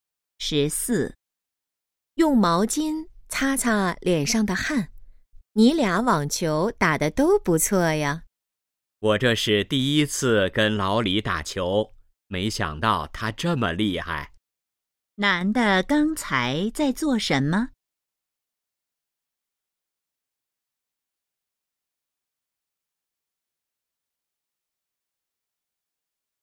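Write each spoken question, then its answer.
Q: 男的刚才在做什么?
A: 打网球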